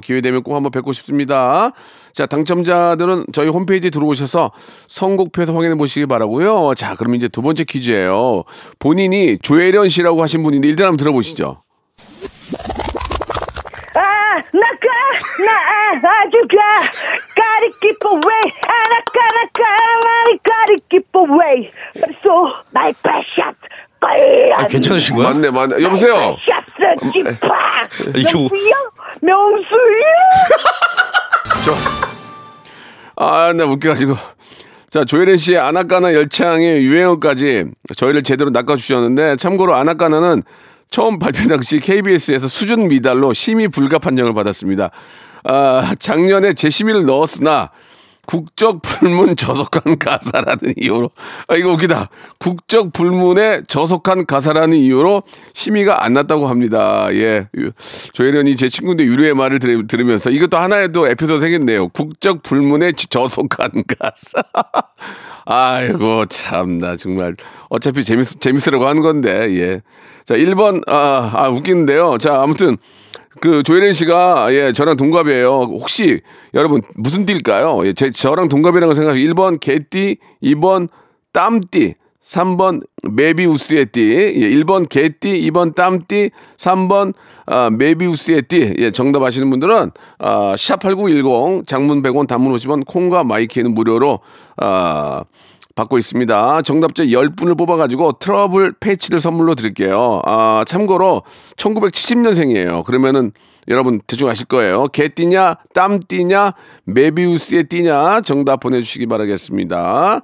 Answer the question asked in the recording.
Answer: 자, 두 번째 퀴즈의 정답은 예, 1번 개띠였습니다.